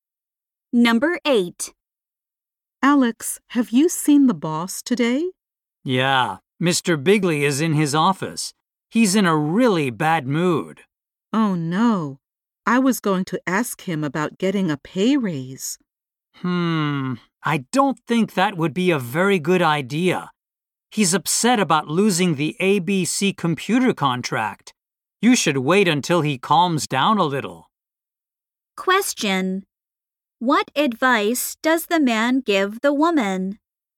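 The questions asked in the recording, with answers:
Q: What advice does the man give the woman?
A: Wait until the boss calms down before asking for a raise.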